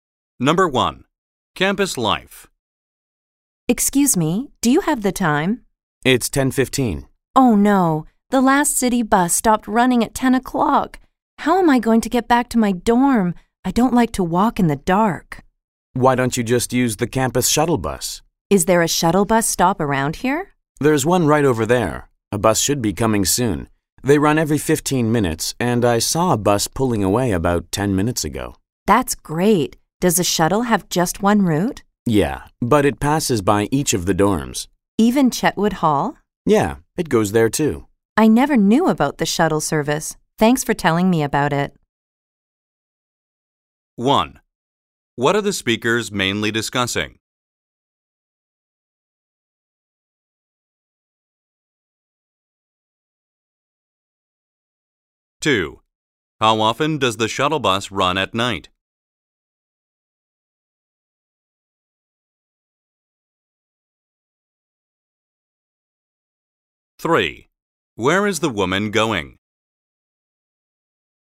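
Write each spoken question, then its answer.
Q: What are the speakers mainly discussing?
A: The campus shuttle bus

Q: How often does the shuttle bus run at night?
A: Every 15 minutes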